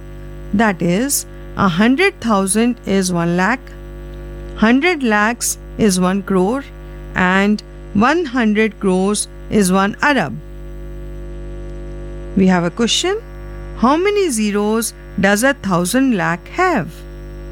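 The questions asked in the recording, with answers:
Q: How many zeros does 1,000 lakh have?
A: 8 zeros (1,000 lakh = 10 crore)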